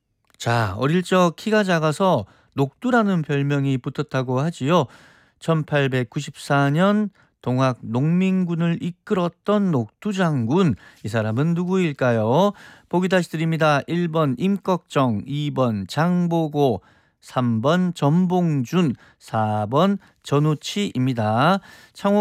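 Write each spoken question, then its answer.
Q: 1894년 동학 농민군을 이끌었던 녹두 장군, 이 사람은 누구일까요?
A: 3: 전봉준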